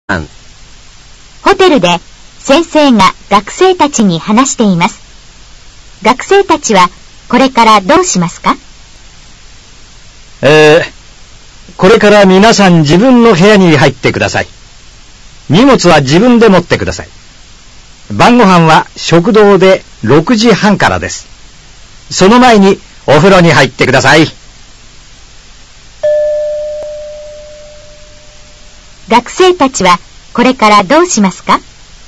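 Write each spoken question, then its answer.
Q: 学生たちはこれからどうしますか?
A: 自分の荷物を持って部屋に入る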